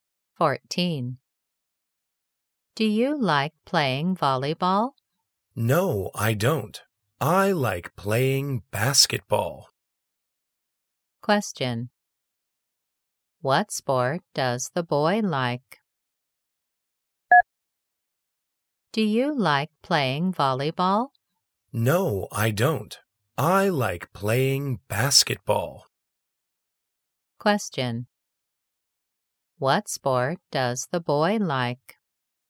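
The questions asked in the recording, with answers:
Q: What sport does the boy like?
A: basketball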